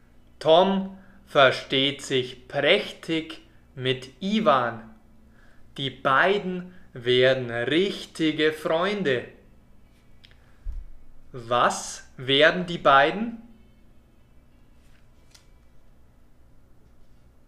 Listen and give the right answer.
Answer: Richtige Freunde. Sie werden richtige Freunde.